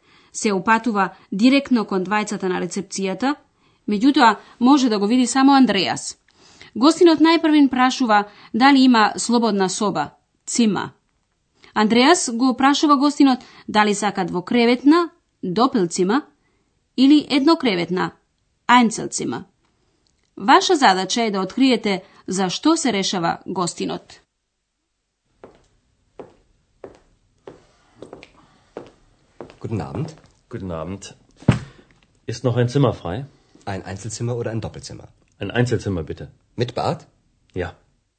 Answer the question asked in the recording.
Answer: Гостинот се реши за еднокреветна соба, со бања, мит бат.